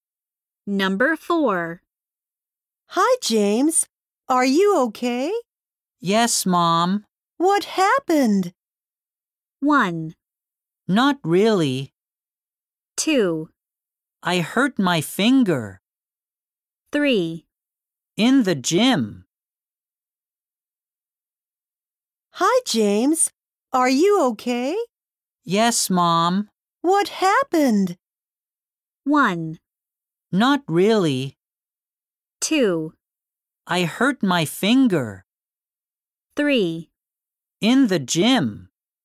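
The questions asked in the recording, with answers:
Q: What happened?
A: 2: I hurt my finger.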